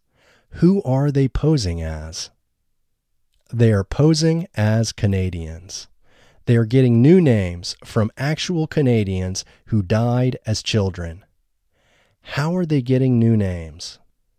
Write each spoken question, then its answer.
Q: How are they getting new names?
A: They are getting new names from actual Canadians who had died as children.